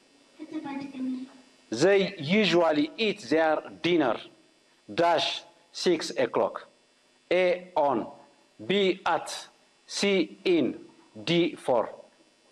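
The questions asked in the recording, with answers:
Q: They usually eat their dinner - 6 o'clock.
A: B: at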